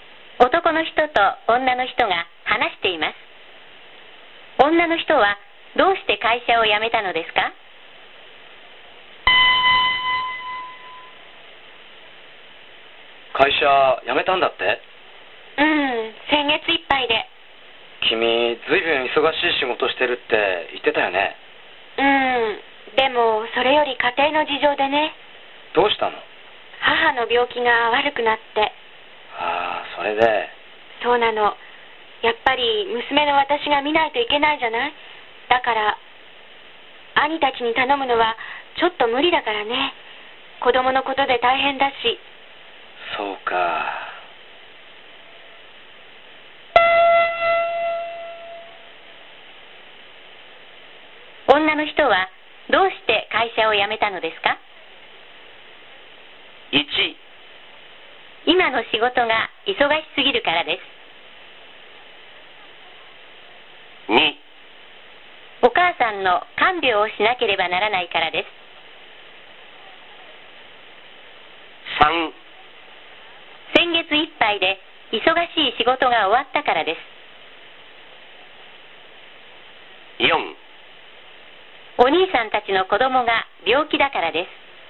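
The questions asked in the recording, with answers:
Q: 女の人はどうして会社を辞めたのですか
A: 2: お母さんの看病をしなければならないからです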